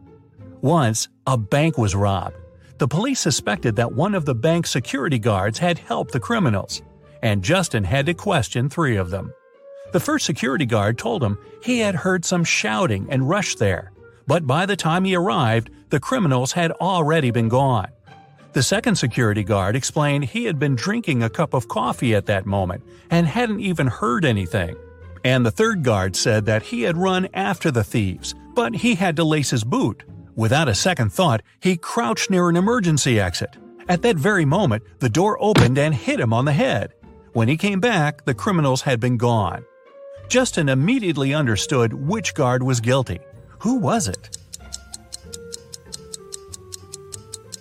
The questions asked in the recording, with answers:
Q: Who was it?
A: It was the third security guard.